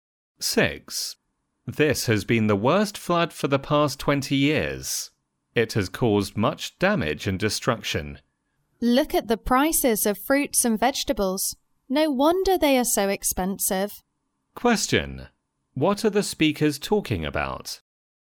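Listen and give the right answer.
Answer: The flood's effect on fruit and vegetable prices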